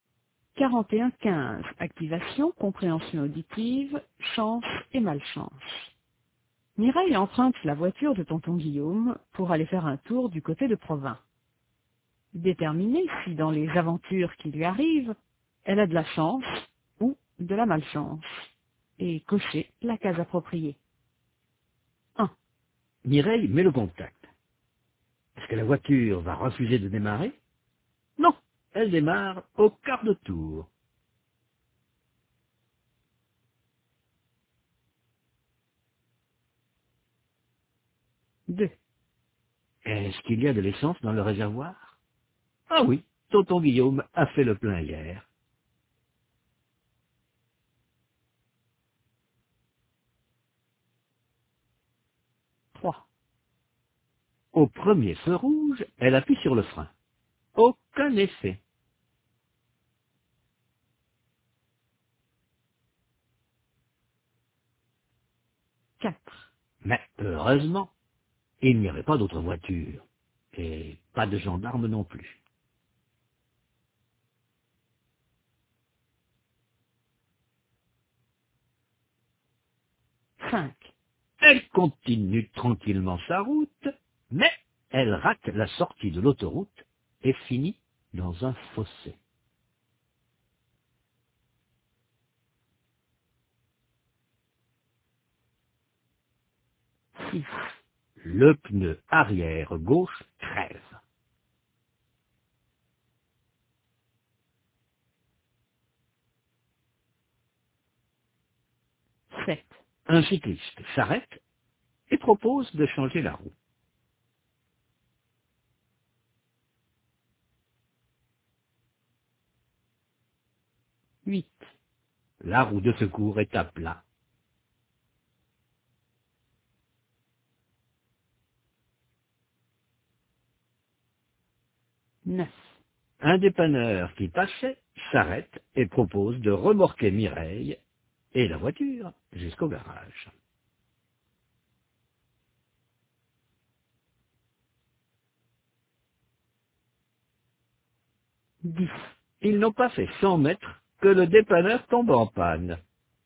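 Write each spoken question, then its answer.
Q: Mireille met le contact. Est-ce que la voiture va refuser de démarrer? Non, elle démarre au quart de tour.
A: chance

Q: Est-ce qu'il y a de l'essence dans le réservoir? Ah oui, tonton Guillaume a fait le plein hier.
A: chance

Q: Au premier feu rouge, elle appuie sur le frein. Aucun effet.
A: malchance

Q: Mais heureusement, il n'y avait pas d'autre voiture, et pas de gendarme non plus.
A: chance

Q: Elle continue tranquillement sa route, mais elle rate la sortie de l'autoroute et finit dans un fossé.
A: malchance

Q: Le pneu arrière gauche crève.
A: malchance

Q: Un cycliste s'arrête et propose de changer la roue.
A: chance

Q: La roue de secours est à plat.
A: malchance

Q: Un dépanneur qui passait s'arrête et propose de remorquer Mireille et la voiture jusqu'au garage.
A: chance

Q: Ils n'ont pas fait 100 mètres que le dépanneur tombe en panne.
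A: malchance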